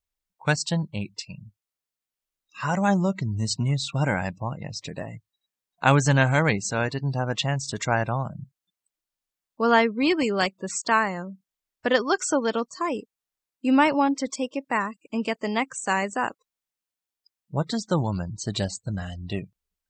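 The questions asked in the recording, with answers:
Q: What does the woman suggest the man do?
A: Exchange the sweater for a larger size.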